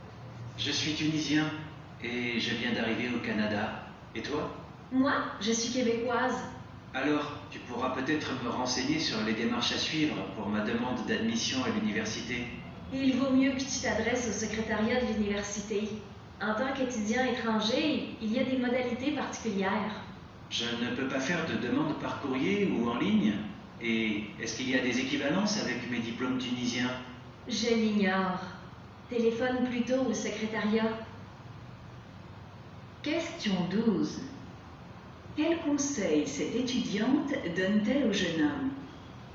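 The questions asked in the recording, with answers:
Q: Quel conseil cette étudiante donne-t-elle au jeune homme?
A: De s'adresser (téléphoner) au secrétariat de l'université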